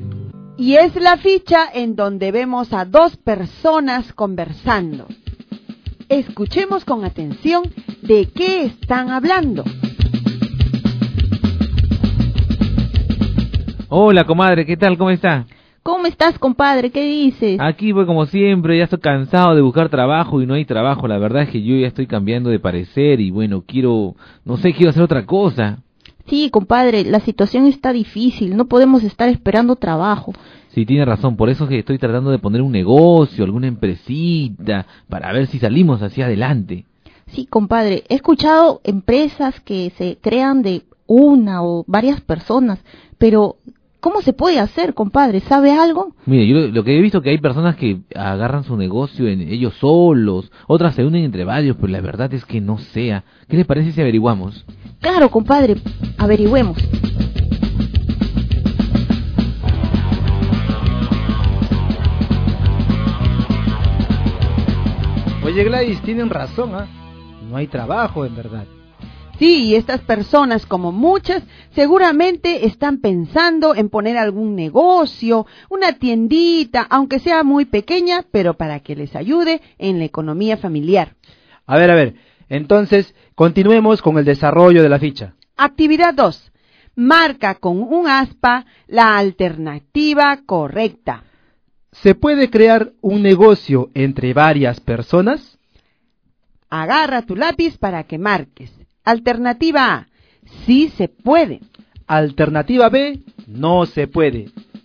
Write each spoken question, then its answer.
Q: ¿Se puede crear un negocio entre varias personas?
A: La alternativa correcta en la actividad 2 es la letra A, porque sí se puede crear un negocio entre varias personas.